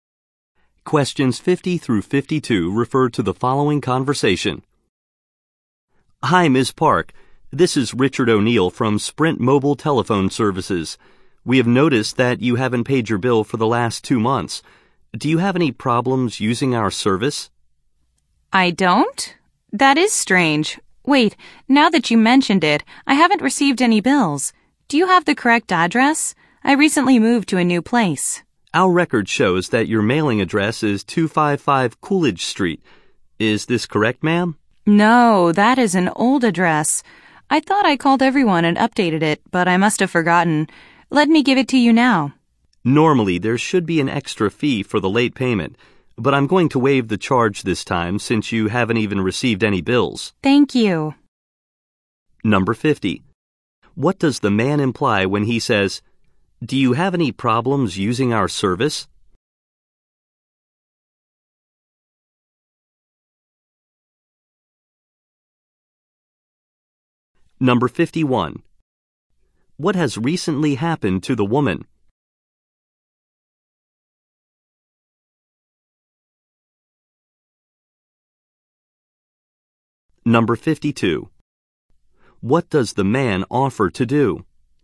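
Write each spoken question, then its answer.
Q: What has recently happened to the woman?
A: She moved to a new place

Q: What does the man offer to do?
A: Waive the late payment fee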